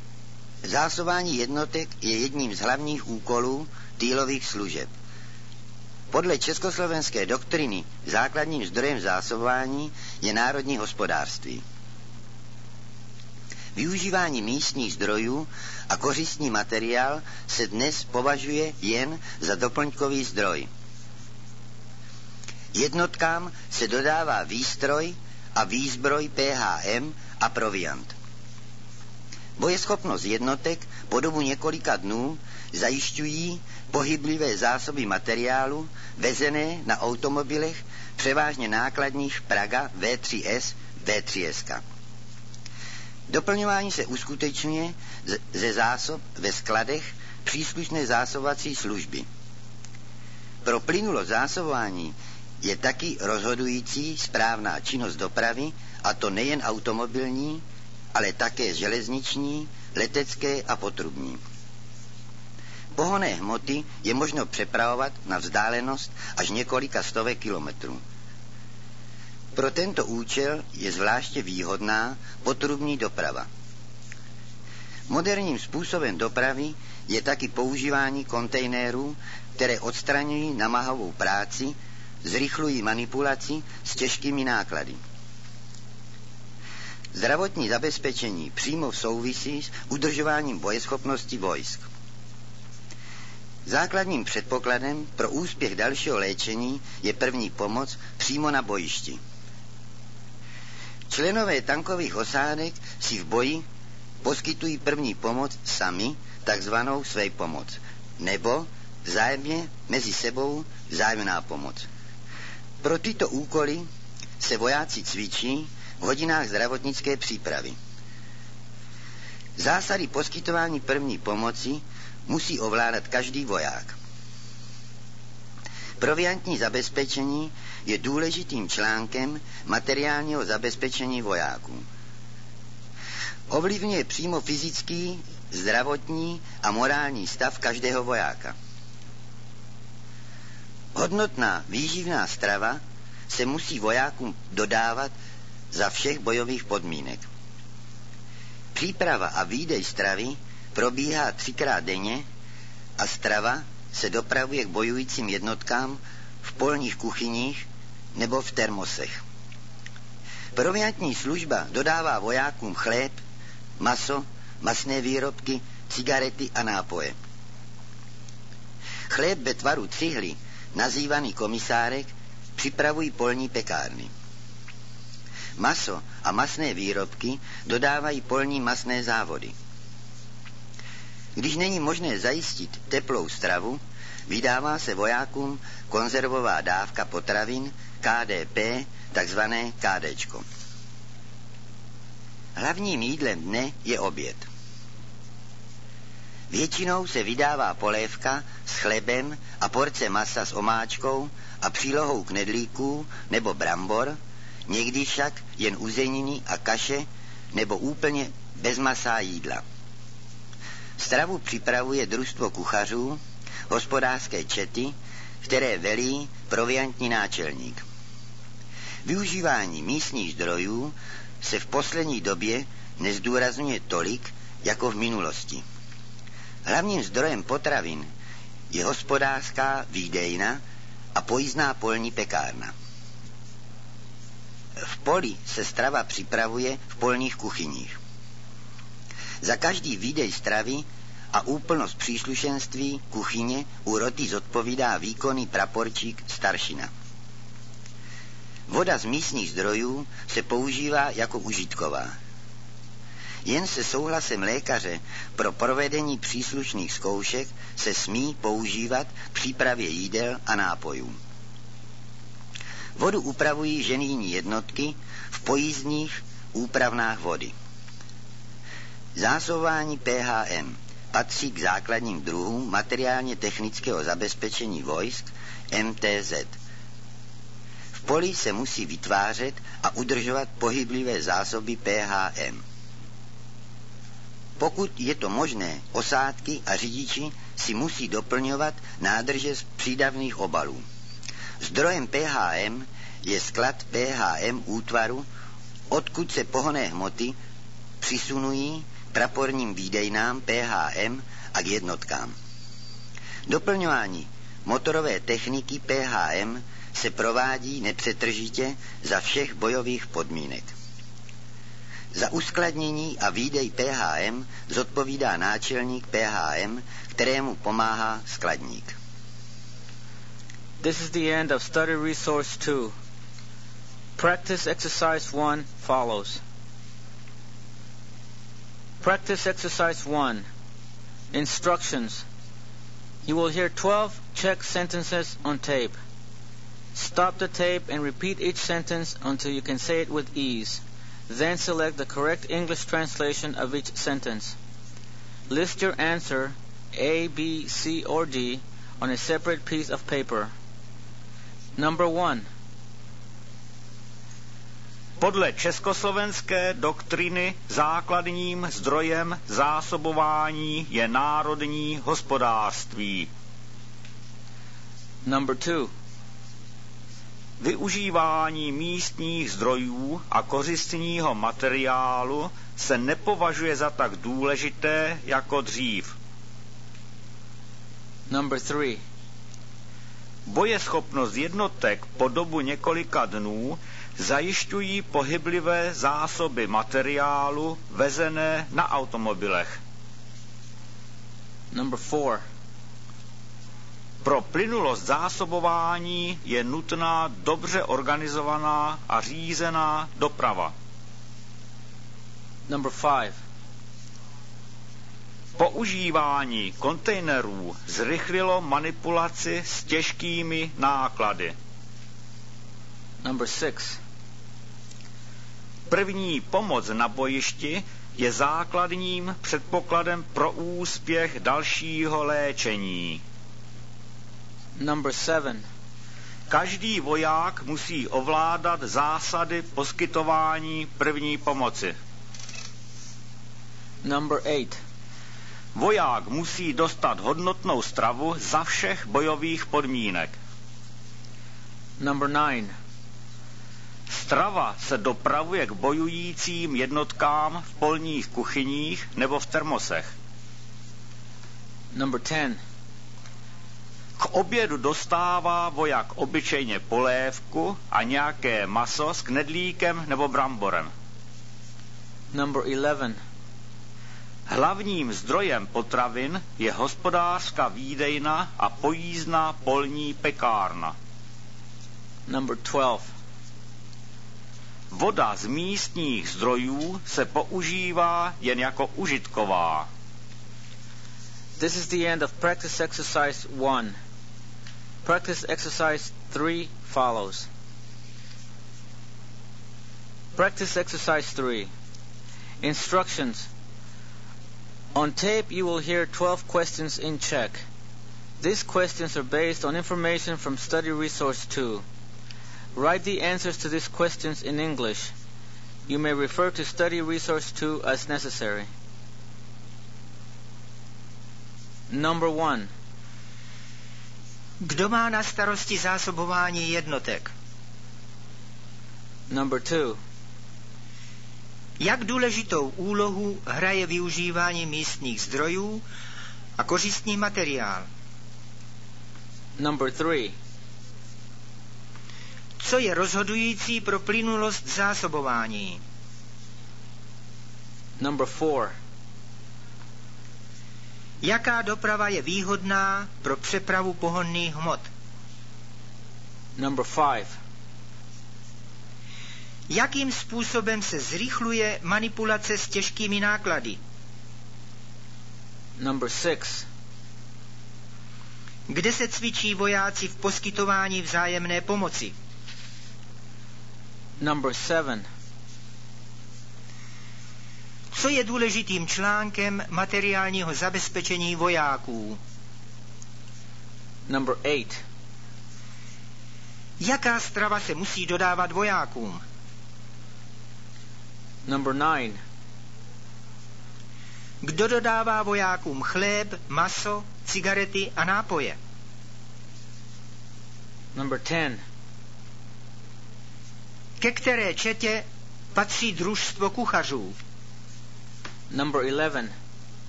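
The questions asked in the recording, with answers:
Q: Kdo má na starosti zásobování jednotek?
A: týlové služby

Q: Jak důležitou úlohu hraje využívání místních zdrojů a kořistní materiál?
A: považuje se dnes jen za doplňkový zdroj

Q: Co je rozhodující pro plynulost zásobování?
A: správná činnost dopravy

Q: Jaká doprava je výhodná pro přepravu pohonných hmot?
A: potrubní doprava

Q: Jakým způsobem se zrychluje manipulace s těžkými náklady?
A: používáním kontejnerů

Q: Kde se cvičí vojáci v poskytování vzájemné pomoci?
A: v hodinách zdravotnické přípravy

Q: Co je důležitým článkem materiálního zabezpečení vojáků?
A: proviantní zabezpečení

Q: Jaká strava se musí dodávat vojákům?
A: hodnotná výživná strava

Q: Kdo dodává vojákům chléb, maso, cigarety a nápoje?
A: proviantní služba

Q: Ke které četě patří družstvo kuchařů?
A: k hospodářské četě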